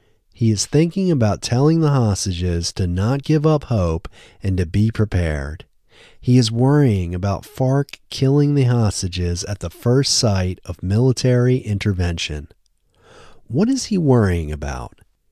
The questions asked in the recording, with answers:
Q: What is he worrying about?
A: He is worrying about the FARC killing the hostages.